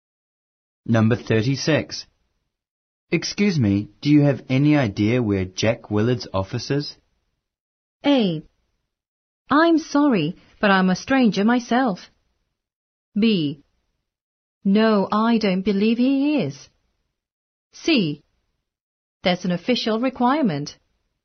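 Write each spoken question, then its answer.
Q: Excuse me, do you have any idea where Jack Willard's office is?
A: A: I'm sorry, but I'm a stranger myself.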